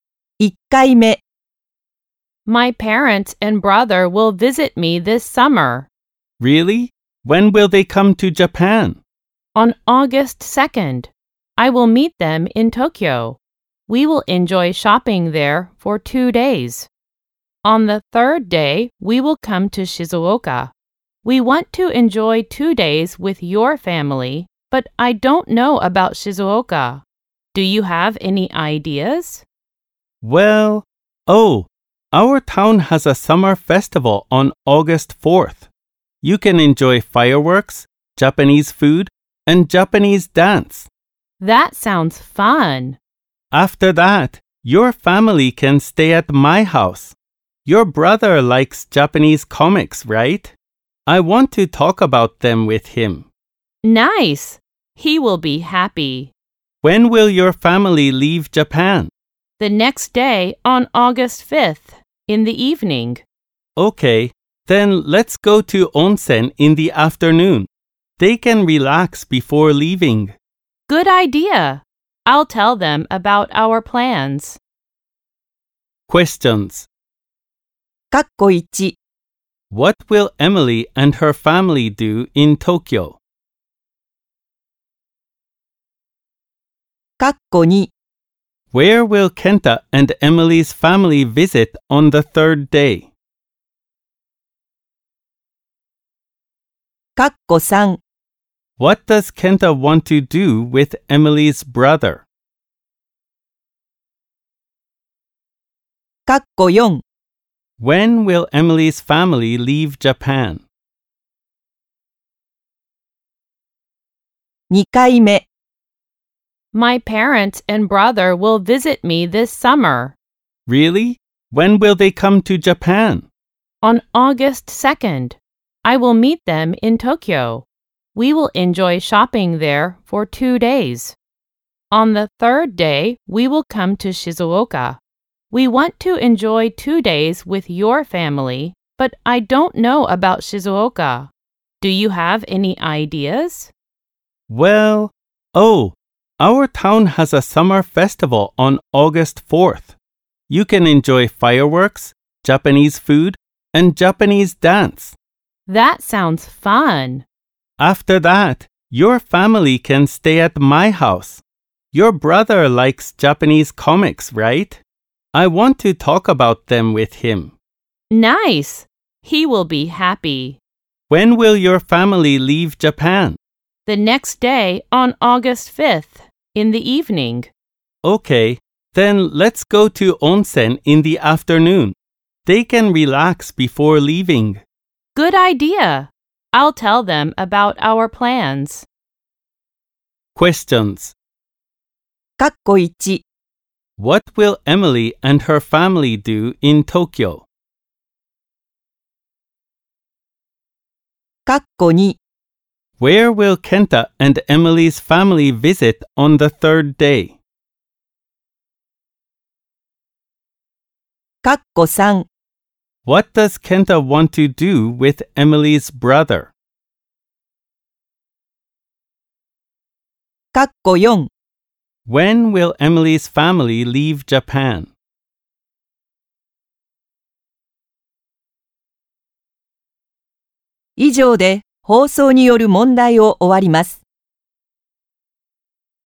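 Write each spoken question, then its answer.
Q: What will Emily and her family do in Tokyo?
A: They will enjoy shopping for 2 days

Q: Where will Kenta and Emily's family visit on the third day?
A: Shizuoka (the summer festival in Kenta's town)

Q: What does Kenta want to do with Emily's brother?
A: Talk about Japanese comics with him

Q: When will Emily's family leave Japan?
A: On the evening of August 5th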